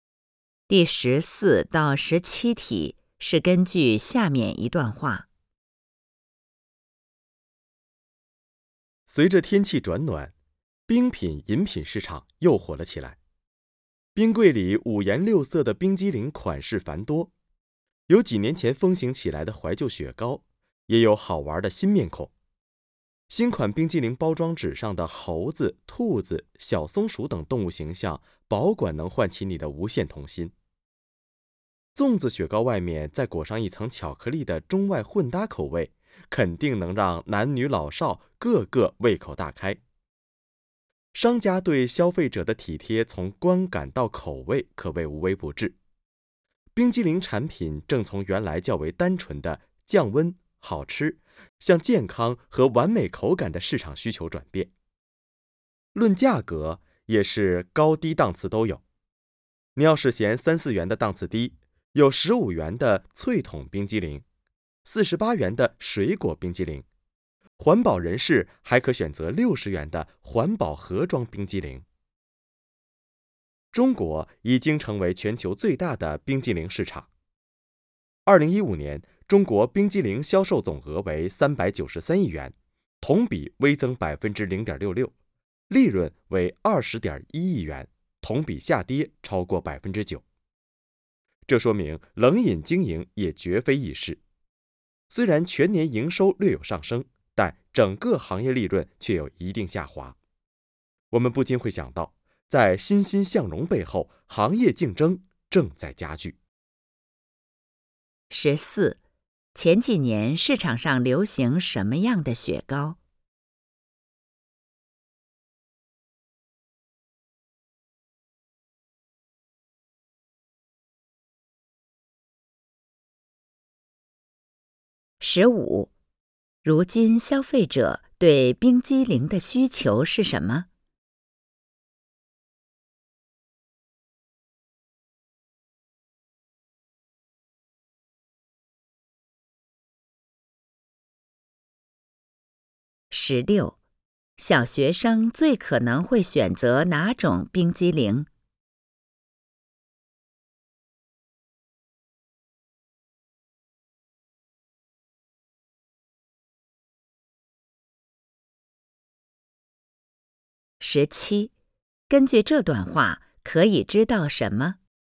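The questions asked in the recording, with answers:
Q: 前几年市场上流行什么样的雪糕?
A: 怀旧雪糕

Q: 如今消费者对冰激凌的需求是什么?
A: 健康和完美口感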